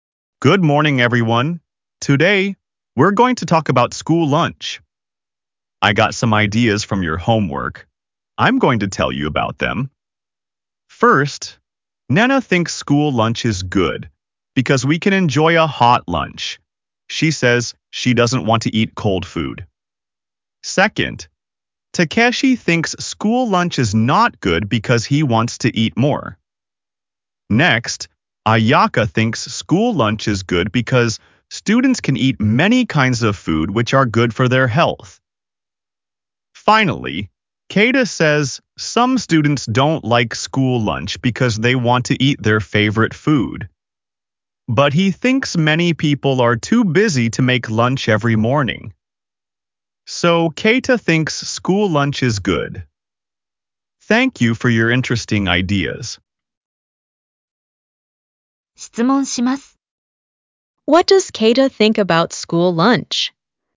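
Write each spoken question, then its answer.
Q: What does Keita think about school lunch?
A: He thinks school lunch is good because many people are too busy to make lunch every morning.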